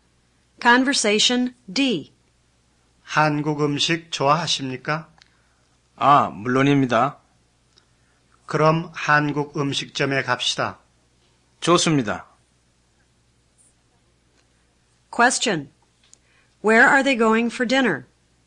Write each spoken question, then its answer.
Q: Where are they going for dinner?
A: They're going to a Korean restaurant.